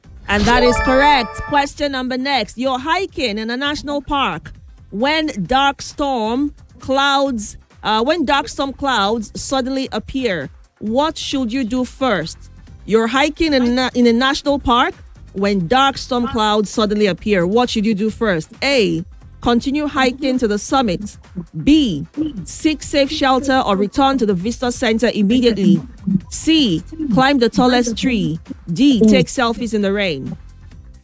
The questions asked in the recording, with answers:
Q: When dark storm clouds suddenly appear, what should you do first?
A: That is correct.